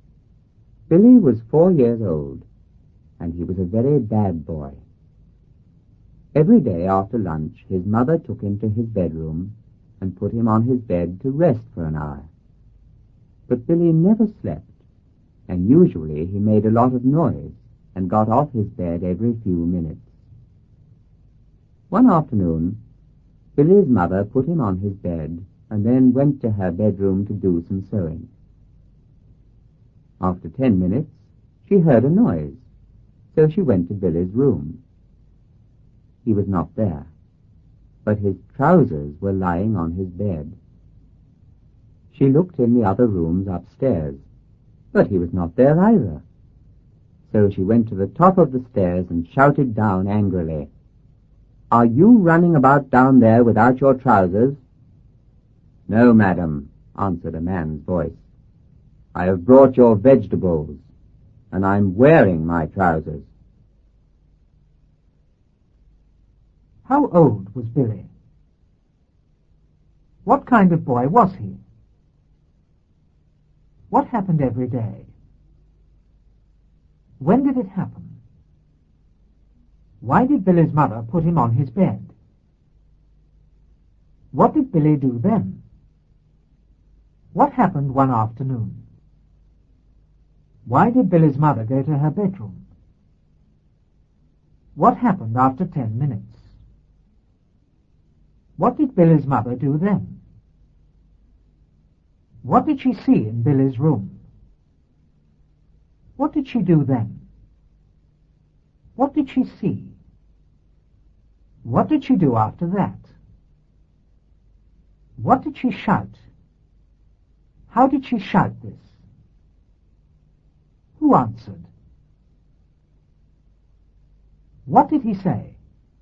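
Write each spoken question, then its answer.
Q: How old was Billy?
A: 4 years old

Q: What kind of boy was he?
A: a very bad boy

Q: What happened every day?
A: his mother put him on his bed to rest for an hour

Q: When did it happen?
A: after lunch

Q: Why did Billy's mother put him on his bed?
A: to rest for an hour

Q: What did Billy do then?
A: he never slept, made a lot of noise and got off his bed

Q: Why did Billy's mother go to her bedroom?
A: to do some sewing

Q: What happened after 10 minutes?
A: she heard a noise

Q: What did Billy's mother do then?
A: she went to Billy's room

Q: What did she see in Billy's room?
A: his trousers lying on his bed

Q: What did she shout?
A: "Are you running about down there without your trousers?"

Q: How did she shout this?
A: angrily

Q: Who answered?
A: a man

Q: What did he say?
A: "No, madam. I have brought your vegetables, and I'm wearing my trousers."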